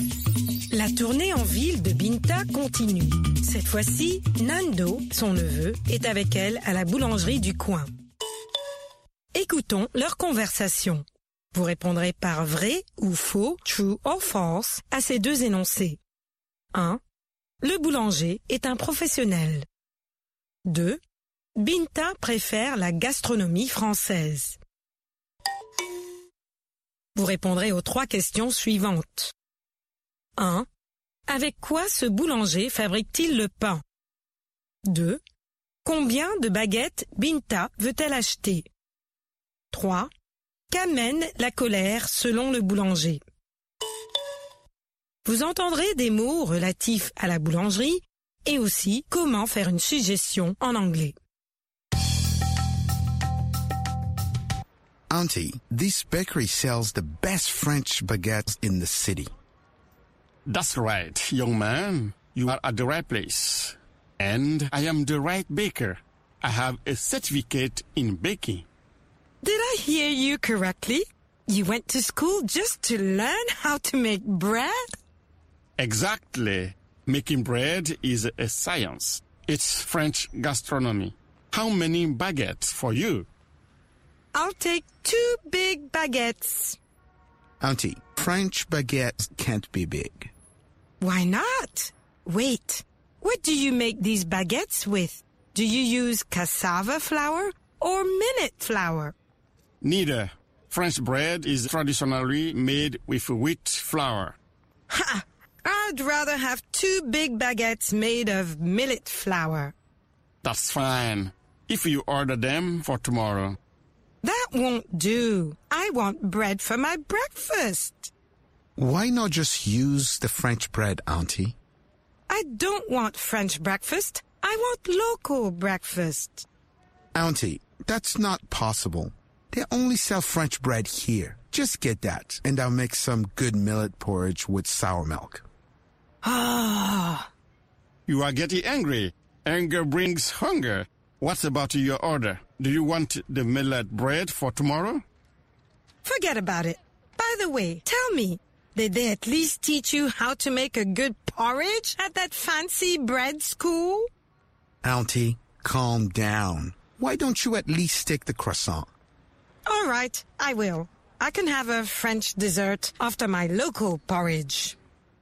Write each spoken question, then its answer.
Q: Le boulanger est un professionnel.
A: L'énoncé 1 est vrai. Le boulanger est un professionnel.

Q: Binta préfère la gastronomie française.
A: L'énoncé 2 est faux.

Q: Avec quoi ce boulanger fabrique-t-il le pain?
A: De la farine de blé.

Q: Combien de baguettes Binta veut-elle acheter?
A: 2 baguettes.

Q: Qu'amène la colère selon le boulanger?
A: La colère amène la faim.